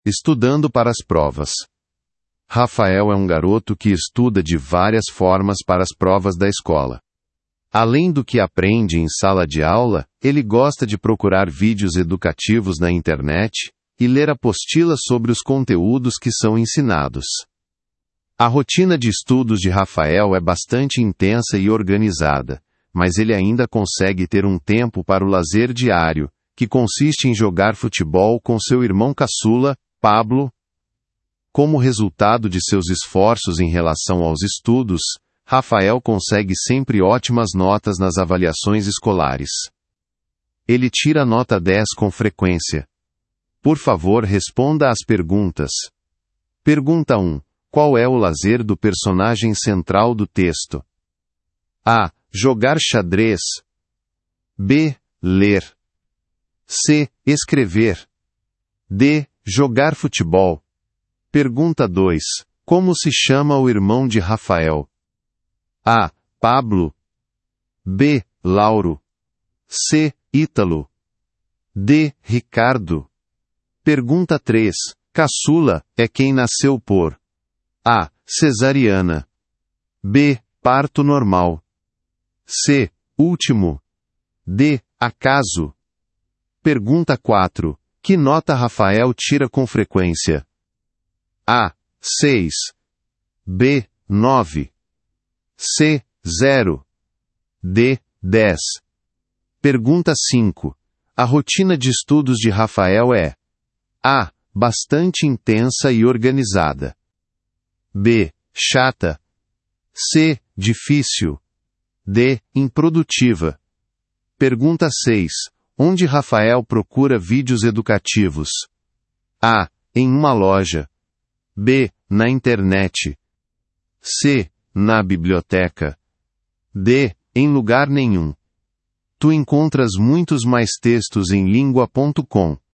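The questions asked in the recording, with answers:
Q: Qual é o lazer do personagem central do texto?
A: D: Jogar futebol

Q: Como se chama o irmão de Rafael?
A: A: Pablo

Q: Que nota Rafael tira com frequência?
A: D: 10

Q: A rotina de estudos de Rafael é:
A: A: bastante intensa e organizada

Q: Onde Rafael procura vídeos educativos?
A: B: na internet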